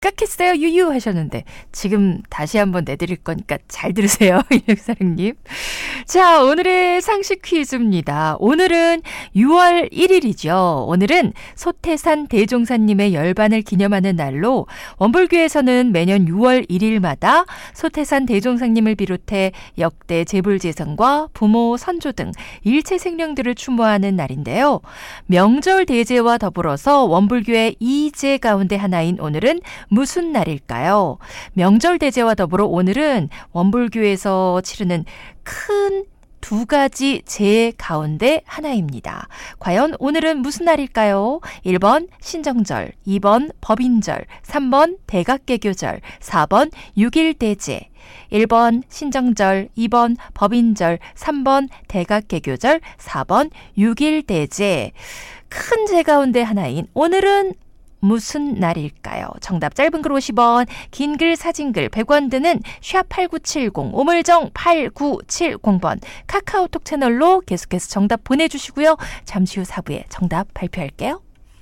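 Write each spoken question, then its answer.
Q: 과연 오늘은 무슨 날일까요?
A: 4: 6일대제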